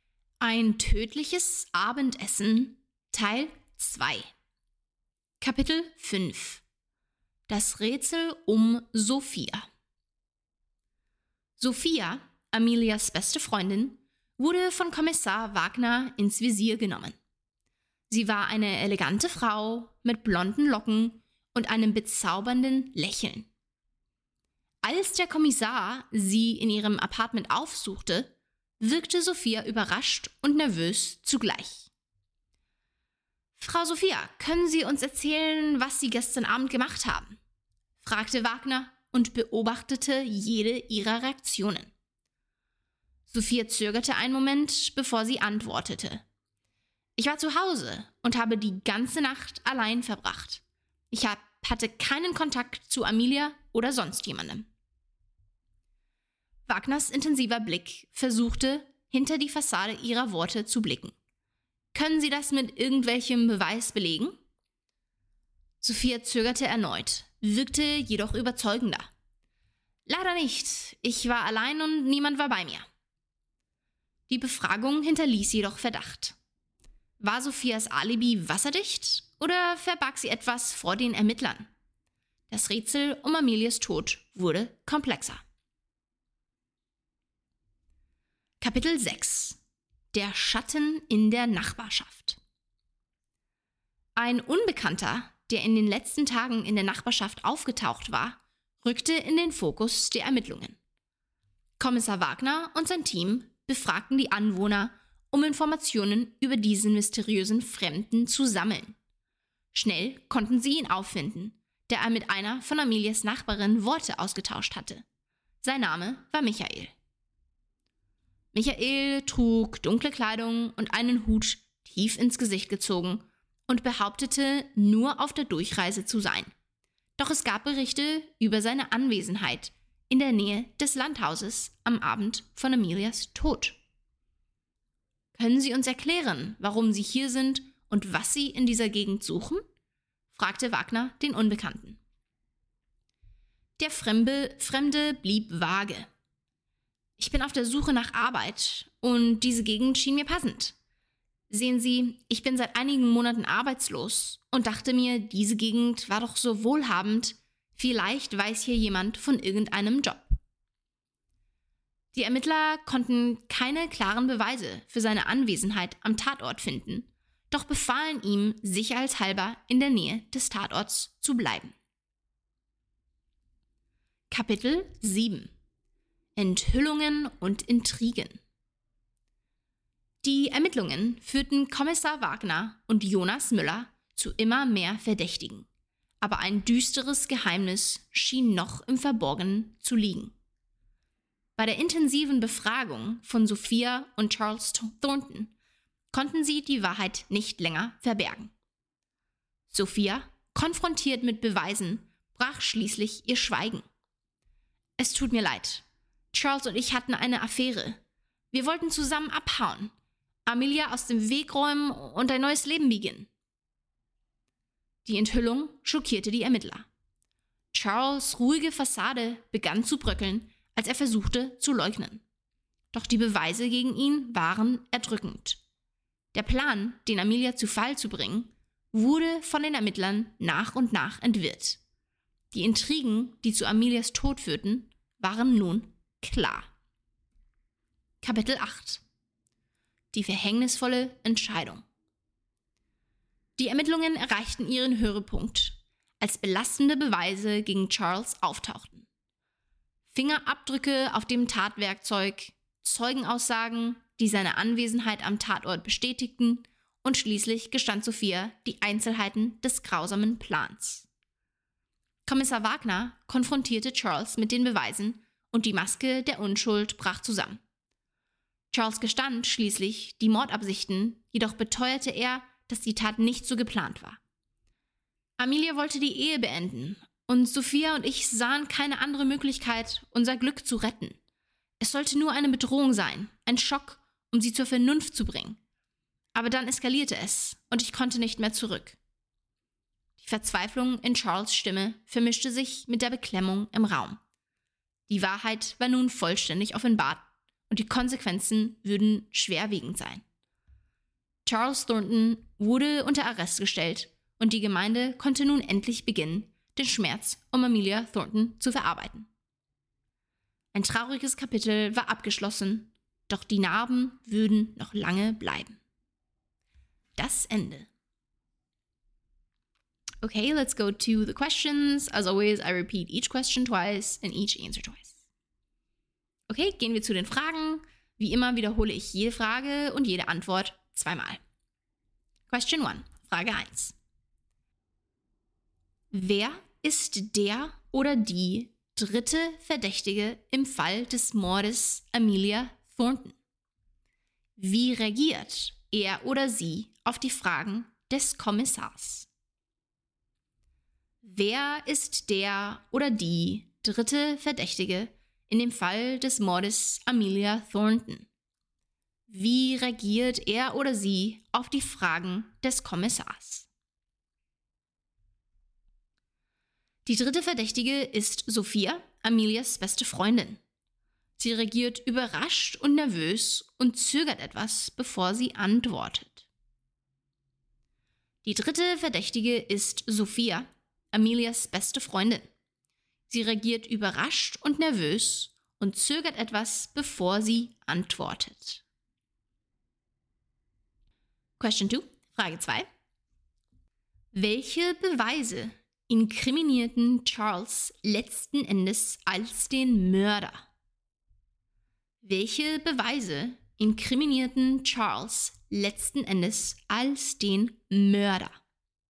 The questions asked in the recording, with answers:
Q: Wer ist der oder die dritte Verdächtige im Fall des Mordes Amelia Thornton? Wie reagiert er oder sie auf die Fragen des Kommissars?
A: Die dritte Verdächtige ist Sophia, Amelias beste Freundin. Sie reagiert überrascht und nervös und zögert etwas, bevor sie antwortet.

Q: Welche Beweise inkriminierten Charles letzten Endes als den Mörder?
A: Fingerabdrücke auf dem Tatwerkzeug, Zeugenaussagen, die seine Anwesenheit am Tatort bestätigten und schließlich Sophias Geständnis zu den Einzelheiten des grausamen Plans inkriminierten Charles letzten Endes.